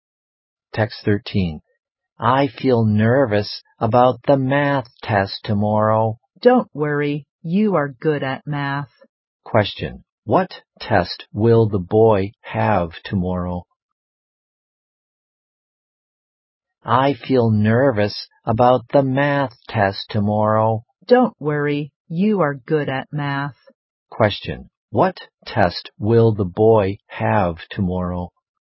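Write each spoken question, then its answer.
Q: What test will the boy have tomorrow?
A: A math test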